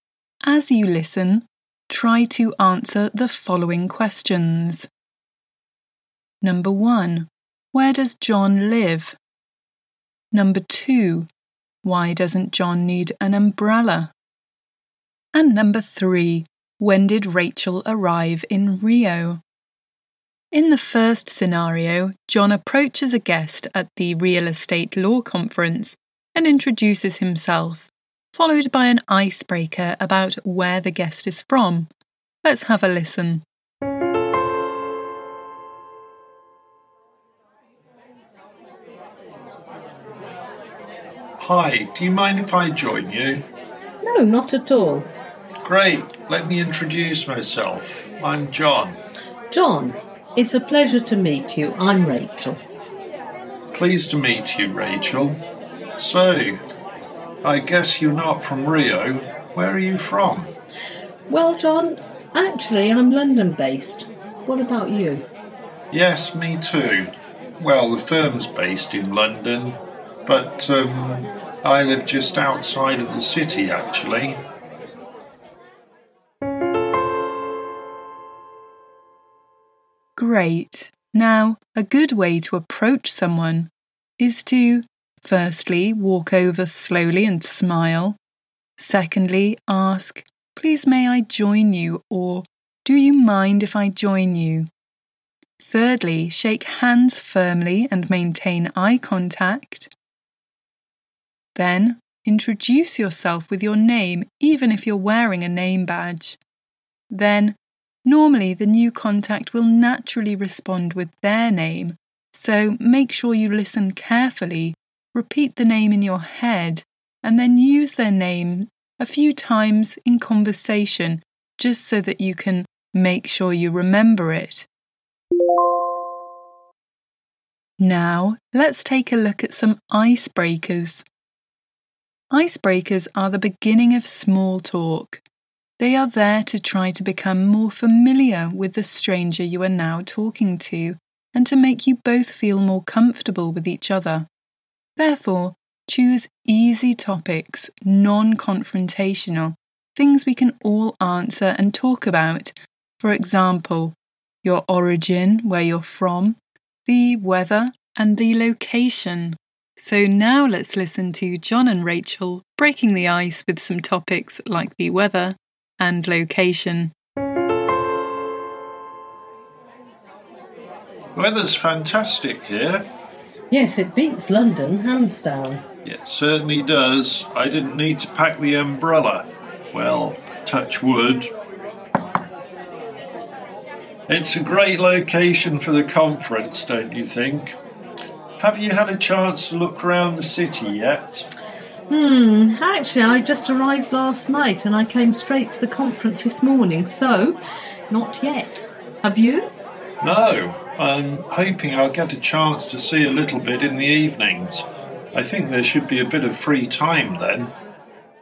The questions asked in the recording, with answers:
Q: Where does John live?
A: John lives just outside of London.

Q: Why doesn't John need an umbrella?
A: John doesn't need the umbrella because the weather is fantastic, meaning it's not raining but it's sunny.

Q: When did Rachel arrive in Rio?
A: So, Rachel arrived last night in Rio.